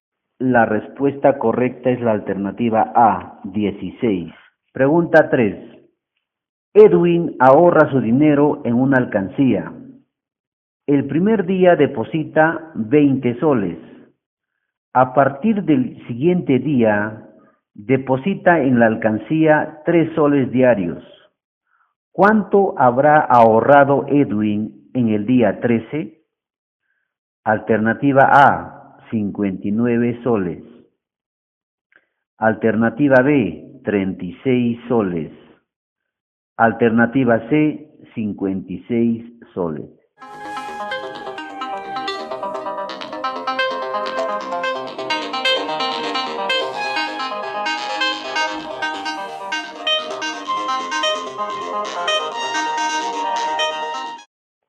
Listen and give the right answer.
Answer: La alternativa C, 56.